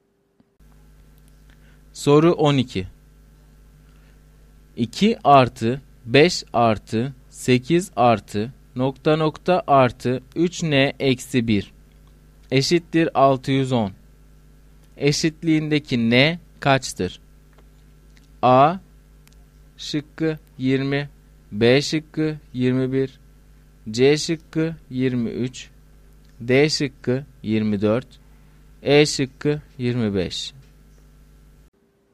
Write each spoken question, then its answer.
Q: Eşitliğindeki N kaçtır?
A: Doğru cevap A şıkkı.